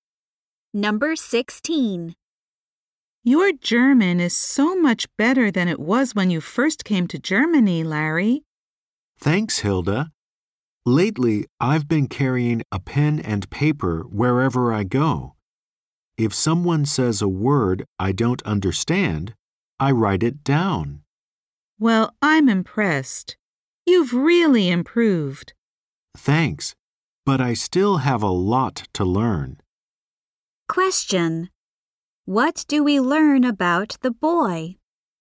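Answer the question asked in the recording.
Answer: His German has improved a lot; he writes down words he doesn't understand.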